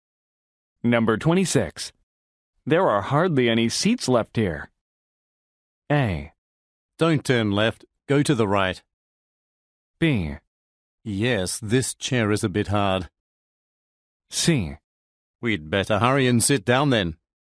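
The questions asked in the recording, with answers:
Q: There are hardly any seats left here.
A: C: We'd better hurry and sit down then.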